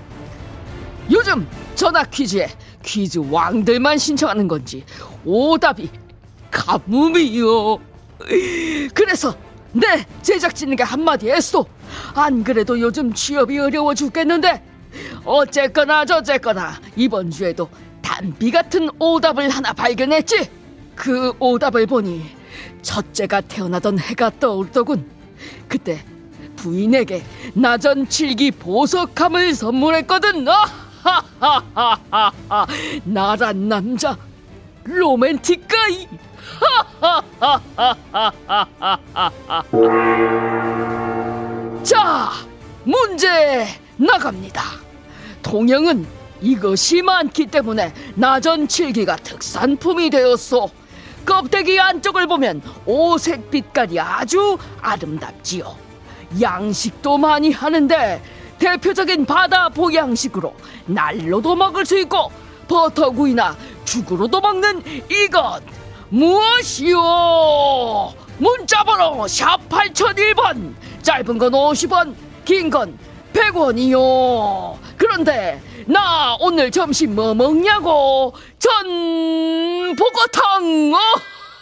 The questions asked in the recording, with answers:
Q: 양식도 많이 하는데 대표적인 바다 보양식으로 날로도 먹을 수 있고 버터구이나 죽으로도 먹는 이것 무엇이오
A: 전복이요